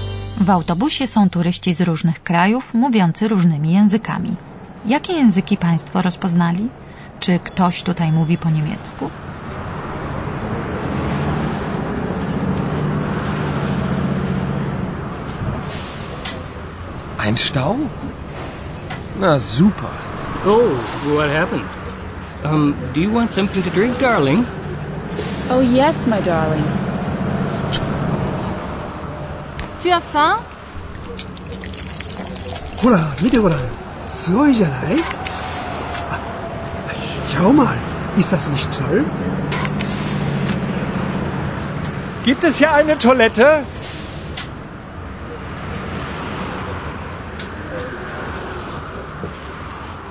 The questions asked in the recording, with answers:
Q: Jakie języki Państwo rozpoznali?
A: Czy rozpoznali Państwo angielski, francuski i japoński?

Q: Czy ktoś tutaj mówi po niemiecku?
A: O niemiecki nie pytamy, bo to chyba zrozumiał każdy.